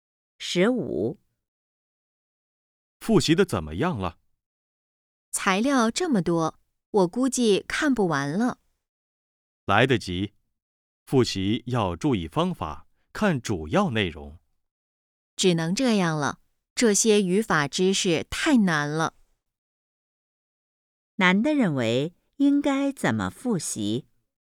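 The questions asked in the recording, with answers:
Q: 难的认为应该怎么复习?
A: 注意方法,看主要内容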